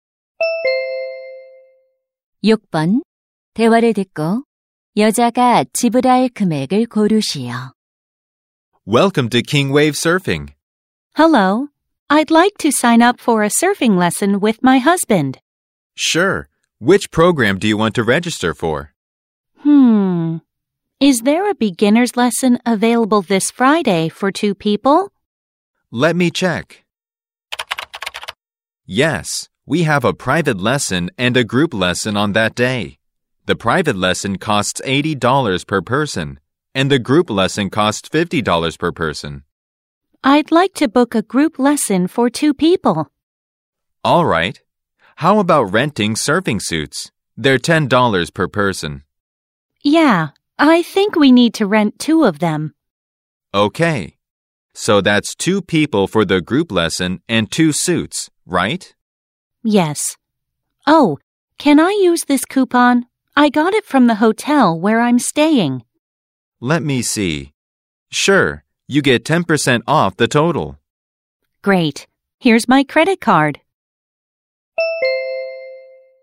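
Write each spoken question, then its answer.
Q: 대화를 듣고 여자가 지불할 금액을 고르시오.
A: 108달러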